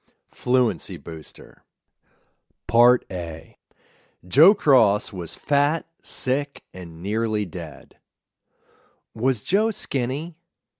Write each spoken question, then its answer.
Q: Was Joe skinny?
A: No, he wasn't skinny. He was fat.